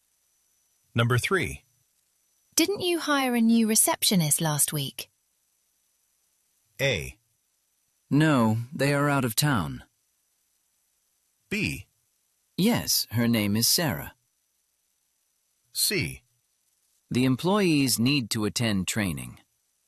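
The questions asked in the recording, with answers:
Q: Didn't you hire a new receptionist last week?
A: B: Yes, her name is Sarah.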